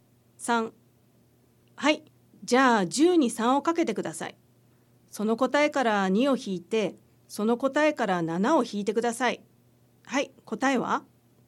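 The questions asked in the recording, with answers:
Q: はい、答えは?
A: 21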